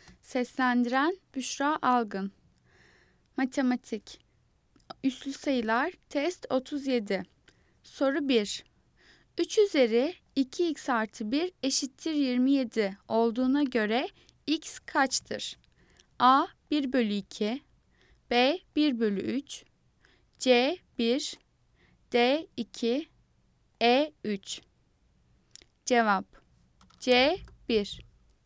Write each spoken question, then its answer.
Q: 3 üzeri 2x artı 1 eşittir 27 olduğuna göre x kaçtır?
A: Cevap C 1.